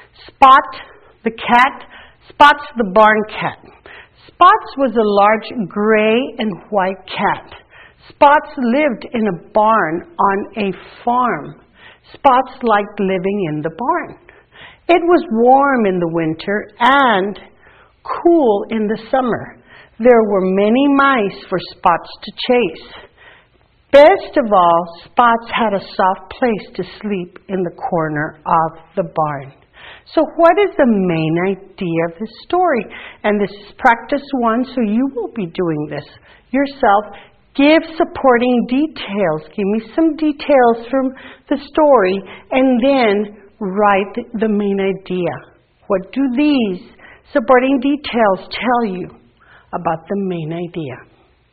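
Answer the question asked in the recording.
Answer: Spots likes living in the barn.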